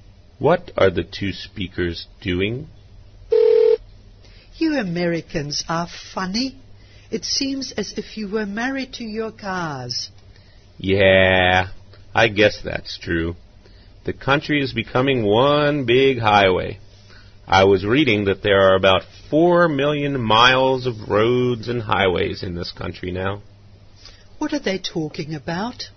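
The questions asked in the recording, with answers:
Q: What are they talking about?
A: Americans and their cars and roads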